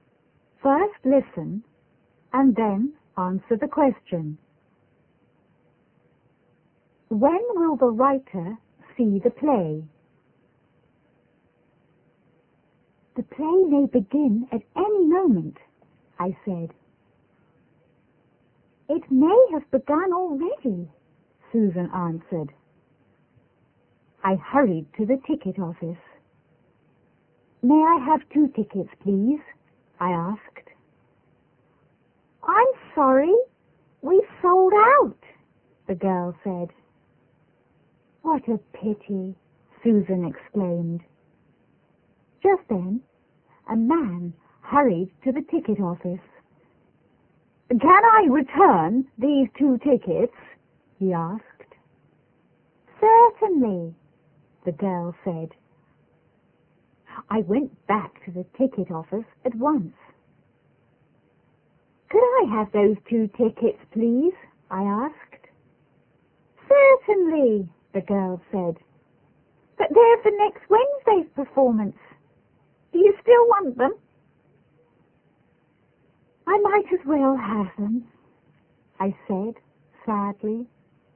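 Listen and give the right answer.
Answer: Next Wednesday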